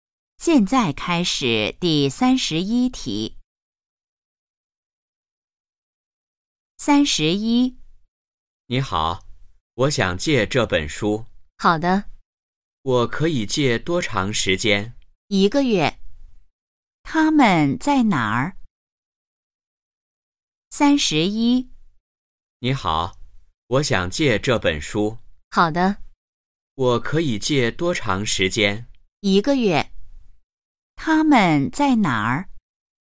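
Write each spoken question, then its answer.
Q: 他们在哪儿?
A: 图书馆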